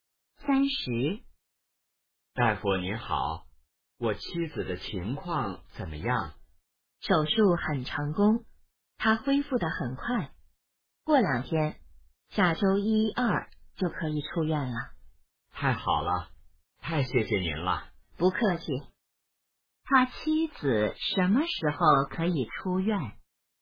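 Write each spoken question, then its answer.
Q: 他妻子什么时候可以出院?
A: 下周一二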